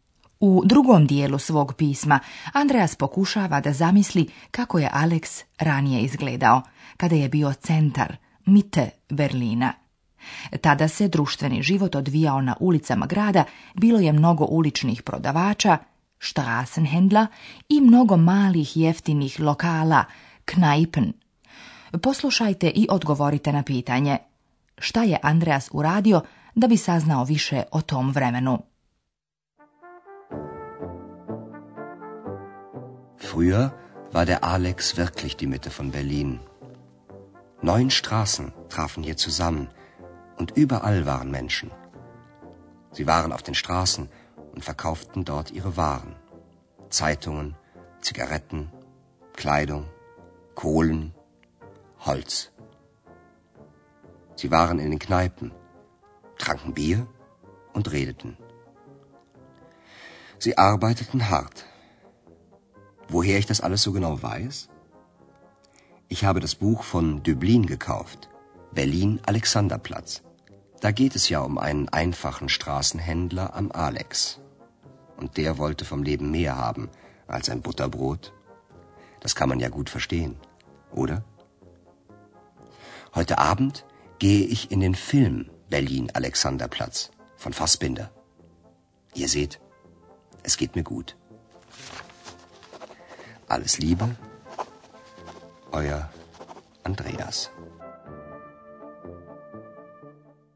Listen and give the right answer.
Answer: Da bi saznao nešto više o životu na Alexanderplatzu onih vremena, Andreas je kupio poznatu Döblinovu knjigu Berlin Alexanderplatz i on će pogledati i film koji je snimljen po toj knjizi.